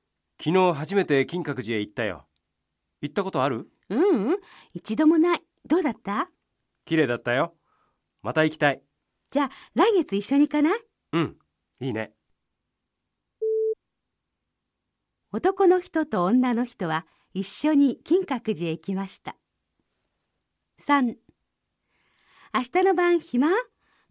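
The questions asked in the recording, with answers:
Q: 男の人と女の人は一緒に金閣寺へ行きました。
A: ×(まだ行っていない。来月一緒に行く)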